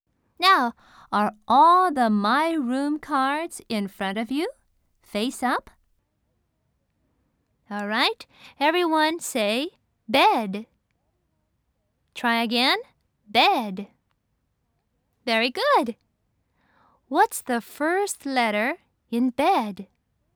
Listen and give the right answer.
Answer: That's right, it's B.